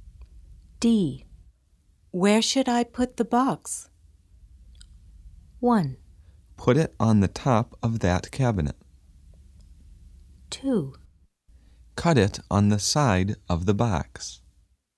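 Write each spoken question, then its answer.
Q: Where should I put the box?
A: 1: Put it on the top of that cabinet.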